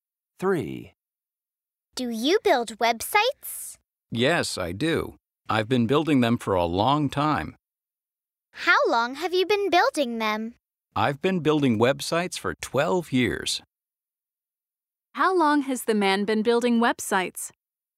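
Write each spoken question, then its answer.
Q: How long has the man been building websites?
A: For 12 years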